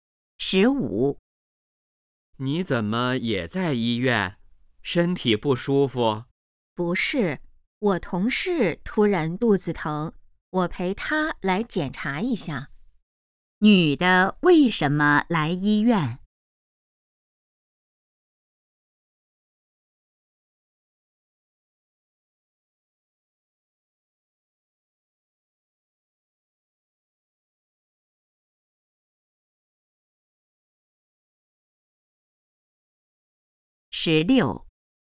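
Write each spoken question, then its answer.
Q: 女的为什么来医院?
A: 陪同事来检查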